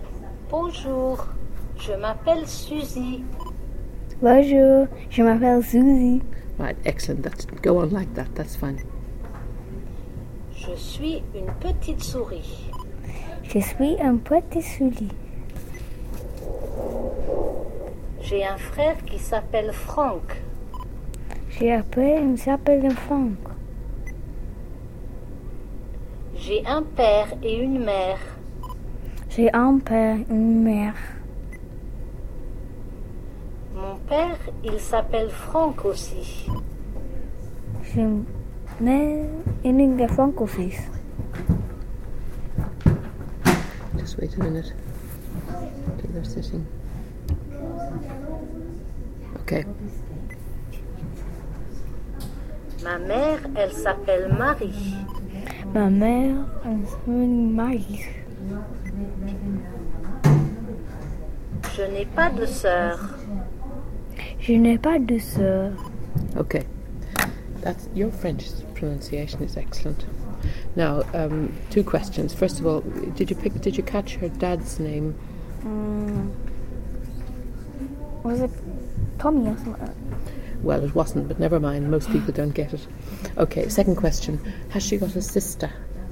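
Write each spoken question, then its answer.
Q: First of all, did you catch her dad's name?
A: Franck

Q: Has she got a sister?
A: No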